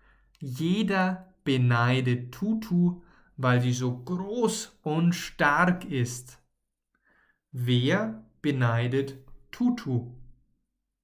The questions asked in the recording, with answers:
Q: Wer beneidet Tutu?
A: Jeder. Jeder beneidet Tutu.